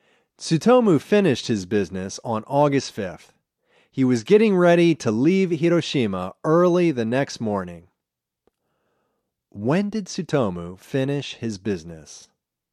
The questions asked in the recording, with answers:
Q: When did Tsutomu finish his business?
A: He finished his business on August 5th.